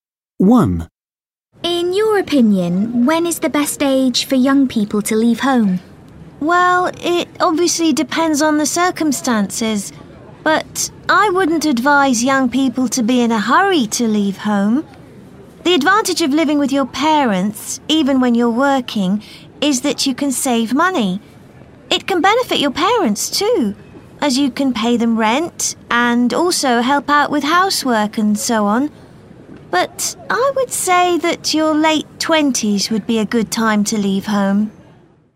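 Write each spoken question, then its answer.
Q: In your opinion, when is the best age for young people to leave home?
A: In their late 20s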